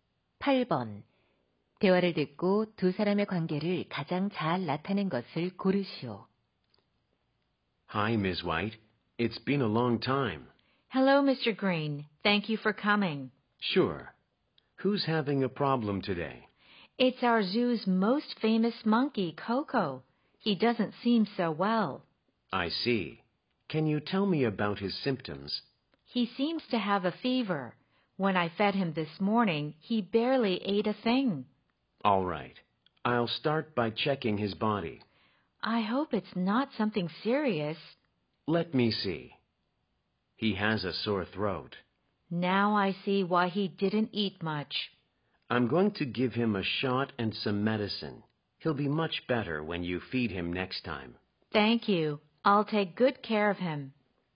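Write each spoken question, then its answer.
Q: 대화를 듣고 두 사람의 관계를 가장 잘 나타낸 것을 고르시오.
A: 동물원 사육사 - 수의사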